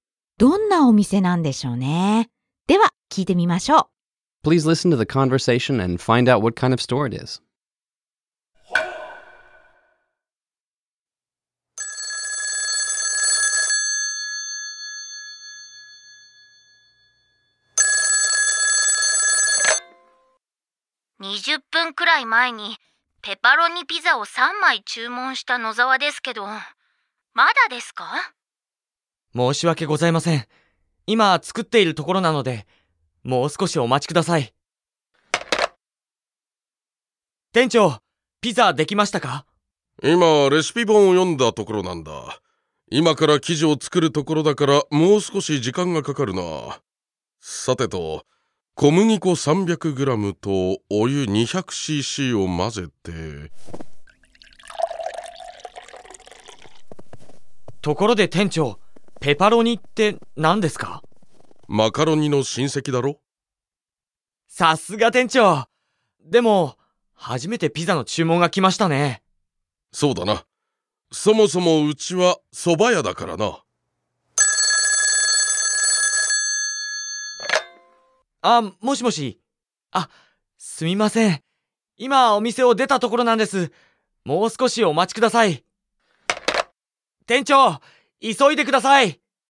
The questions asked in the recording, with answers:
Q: どんなお店なんでしょうね。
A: このお店はピザ屋じゃなくて、うん、蕎麦屋ですね。